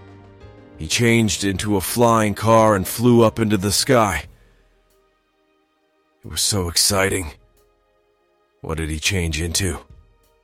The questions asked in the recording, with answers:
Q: What did he change into?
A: Into a flying car. He changed into a flying car.